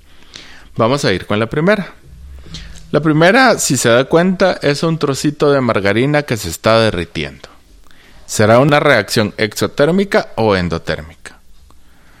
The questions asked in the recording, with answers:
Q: ¿Será una reacción exotérmica o endotérmica?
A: Ah, muy bien, es endotérmica